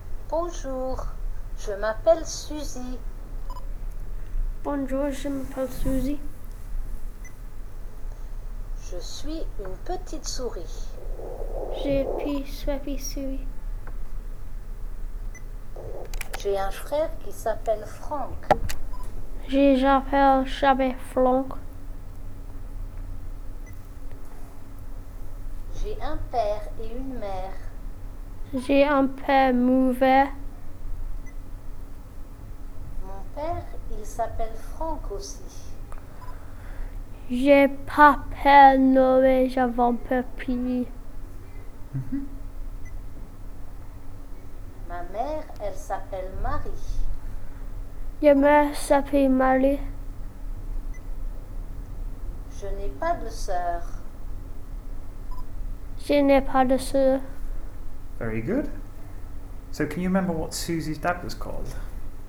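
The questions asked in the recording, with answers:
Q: So, can you remember what Susie's dad was called?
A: Franck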